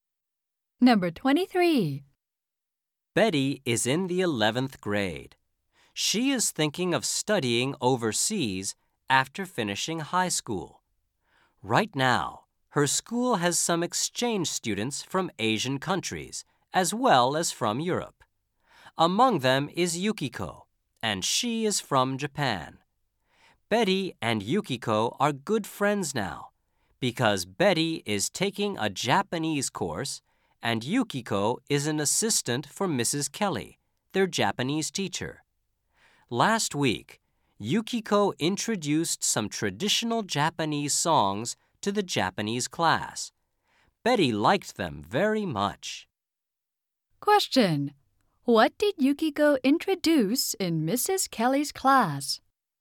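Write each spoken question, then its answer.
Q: What did Yukiko introduce in Mrs. Kelly's class?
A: Traditional Japanese songs.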